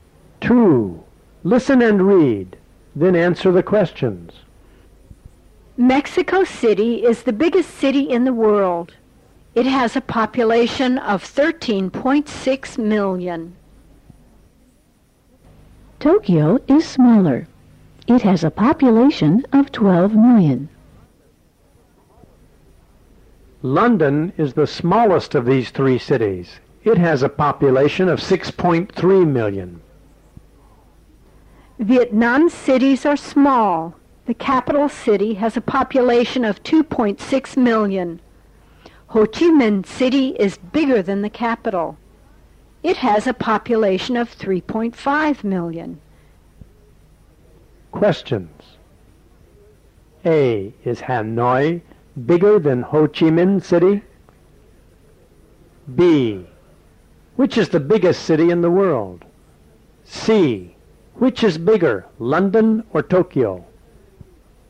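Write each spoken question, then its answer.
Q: Is Hanoi bigger than Ho Chi Minh City?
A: No, it isn't. Ho Chi Minh City is bigger.

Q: Which is the biggest city in the world?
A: Mexico City

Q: Which is bigger, London or Tokyo?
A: Tokyo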